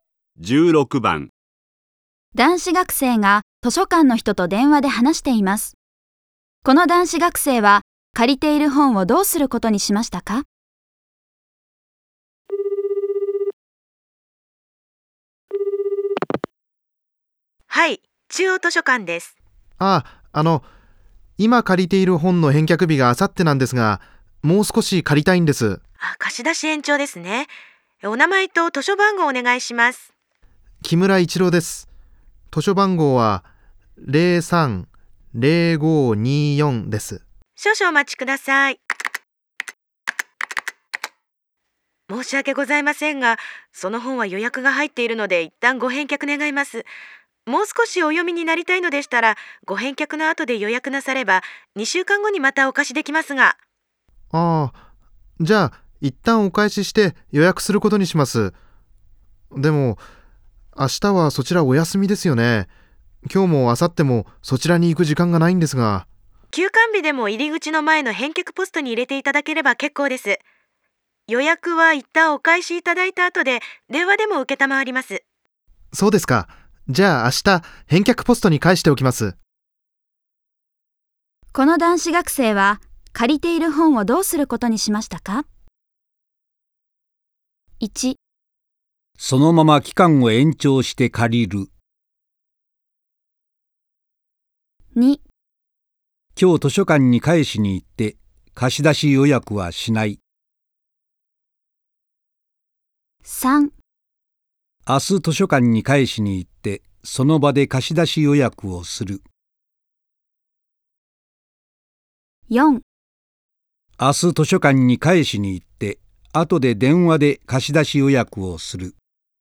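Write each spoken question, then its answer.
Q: この男子学生は借りている本をどうすることにしましたか?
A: 4: 明日図書館に返しに行って後で電話で貸し出し予約をする。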